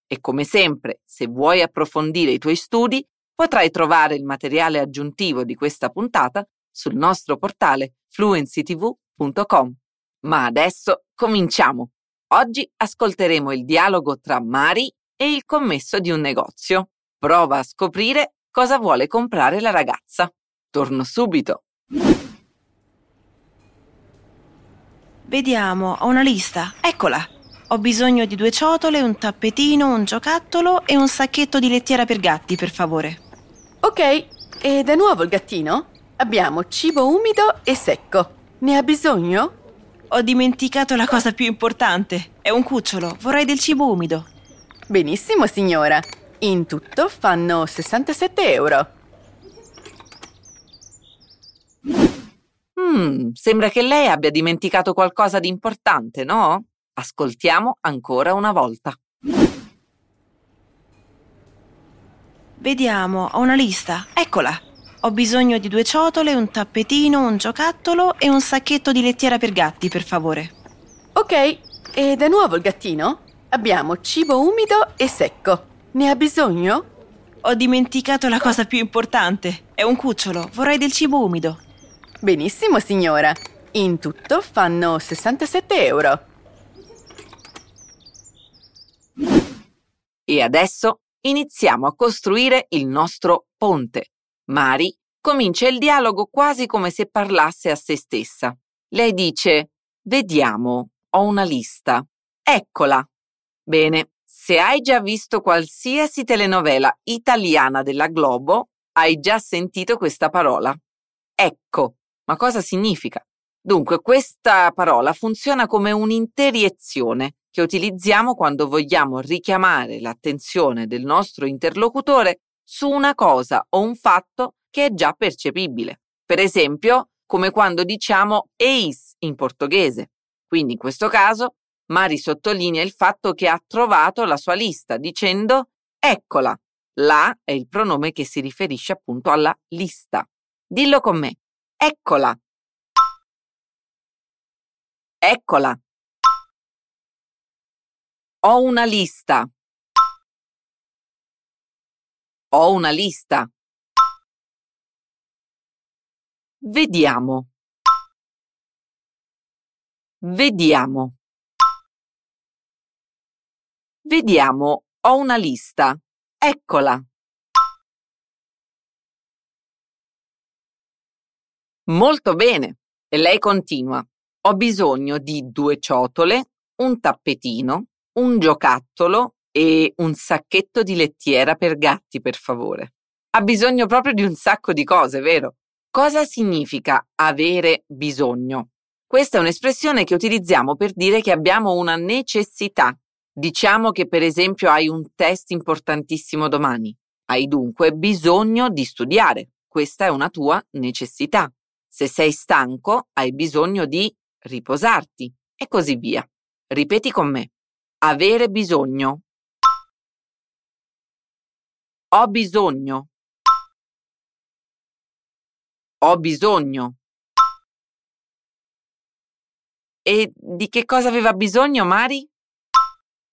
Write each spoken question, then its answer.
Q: E di che cosa aveva bisogno Mari?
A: Eh sì, un sacco di cose. Ha bisogno di due ciotole, un tappetino, un giocattolo e un sacchetto di lettiera per gatti.